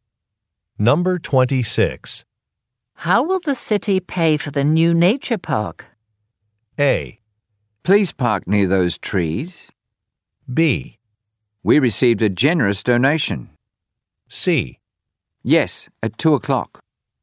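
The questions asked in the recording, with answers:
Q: How will the city pay for the new nature park?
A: B: We received a generous donation.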